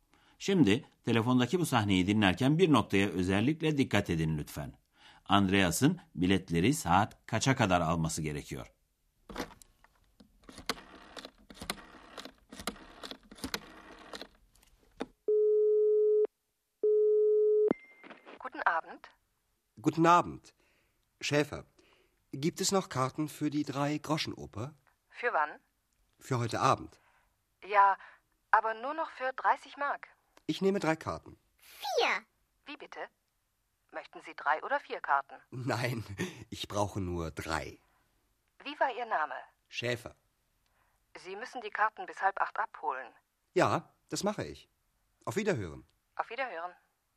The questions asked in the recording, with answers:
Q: Andreas'ın biletleri saat kaça kadar alması gerekiyor?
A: Andreas'ın biletleri saat yedi buçuğa kadar alması gerekiyor.